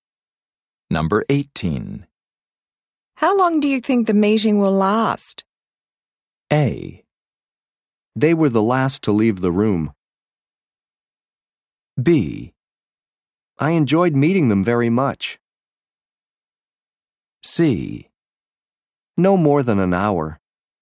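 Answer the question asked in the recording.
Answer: C: No more than an hour.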